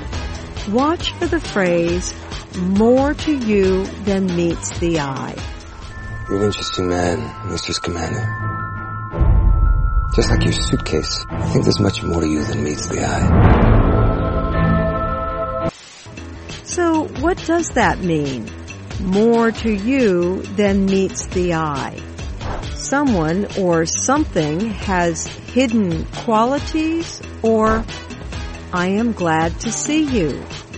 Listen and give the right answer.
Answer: More to you than meets the eye means someone has hidden qualities.